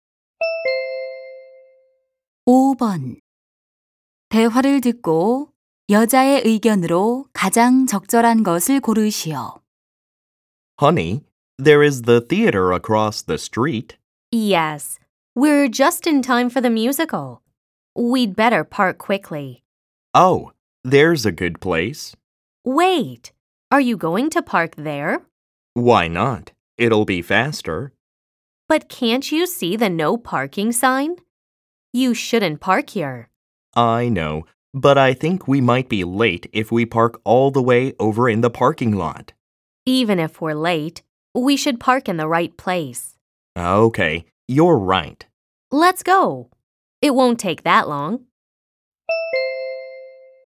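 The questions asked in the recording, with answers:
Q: 대화를 듣고 여자의 의견으로 가장 적절한 것을 고르시오.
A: 늦더라도 정해진 곳에 주차해야 한다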